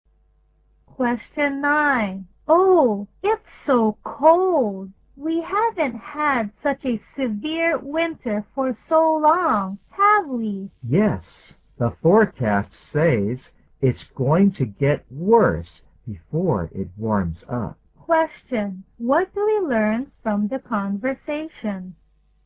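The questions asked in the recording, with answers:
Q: What do we learn from the conversation?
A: This winter is unusually cold, and it will get colder before it warms up.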